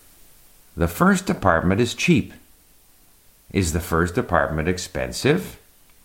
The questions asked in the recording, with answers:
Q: Is the first apartment expensive?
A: No, the first apartment is not expensive.